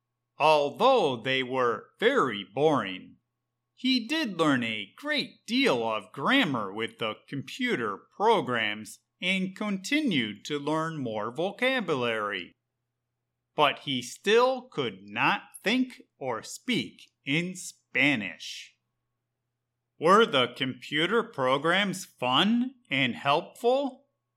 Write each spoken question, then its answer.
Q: Were the computer programs fun and helpful?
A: No, the computer programs were very boring and did not help David to think or speak in Spanish.